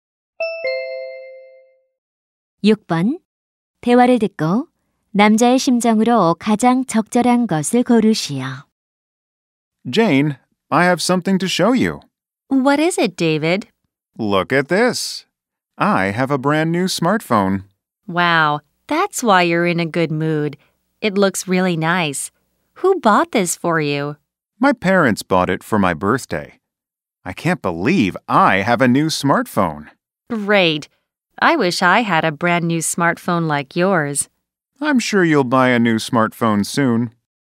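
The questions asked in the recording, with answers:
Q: 대화를 듣고 남자의 심정으로 가장 적절한 것을 고르시오.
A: 신남, 기쁨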